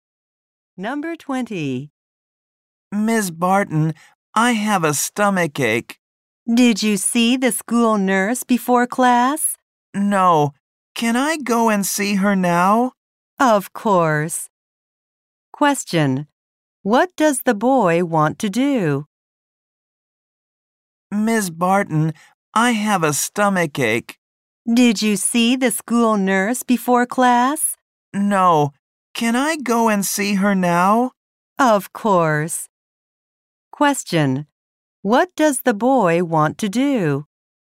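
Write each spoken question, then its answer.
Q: Question. What does the boy want to do?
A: See the school nurse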